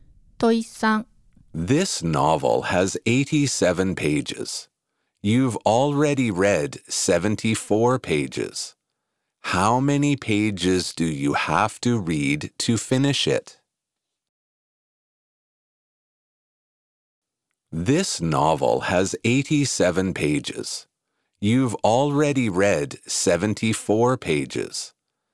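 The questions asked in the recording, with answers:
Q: How many pages do you have to read to finish it?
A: 13 pages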